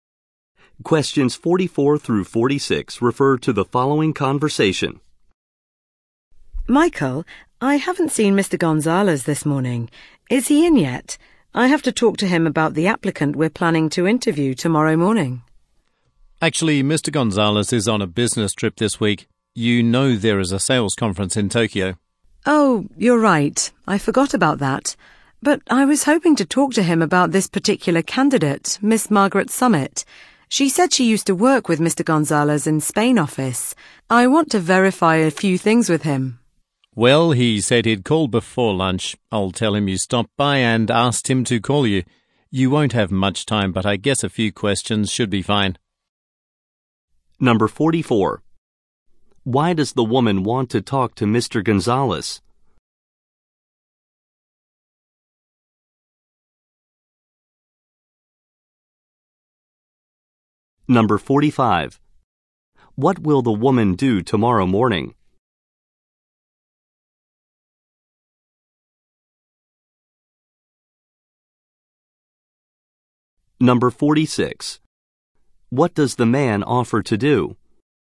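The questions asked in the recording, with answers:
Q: What will the woman do tomorrow morning?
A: Interview a job applicant

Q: What does the man offer to do?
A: Ask Mr. Gonzalez to call her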